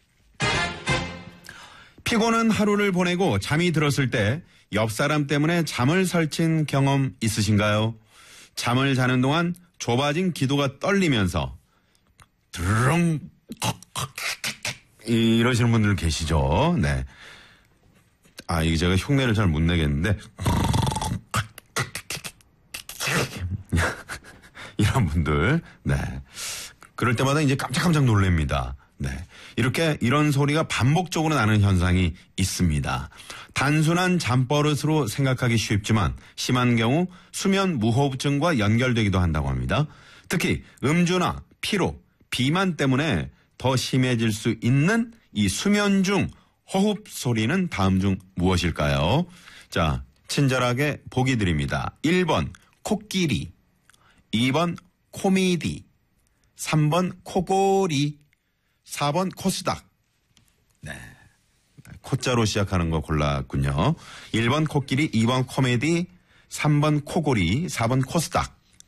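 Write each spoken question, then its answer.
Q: 특히 음주나 피로, 비만 때문에 더 심해질 수 있는 이 수면 중 호흡 소리는 다음 중 무엇일까요?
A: 3: 코골이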